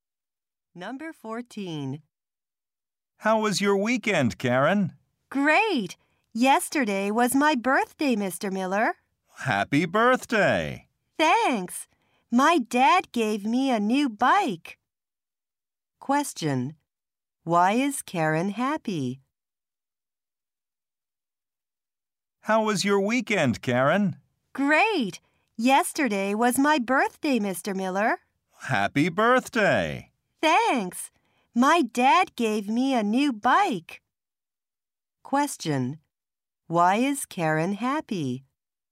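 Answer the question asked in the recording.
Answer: She got a new bike for her birthday.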